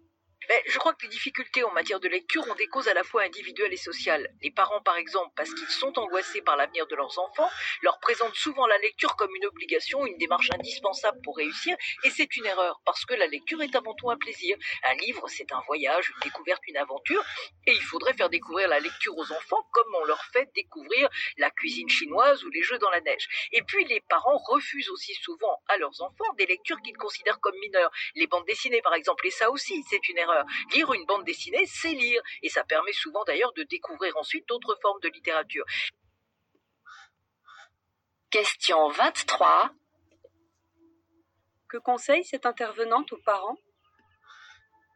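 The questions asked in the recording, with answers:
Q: Que conseille cette intervenante aux parents ?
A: Présenter la lecture comme un plaisir plutôt qu'une obligation, et accepter des lectures comme les bandes dessinées.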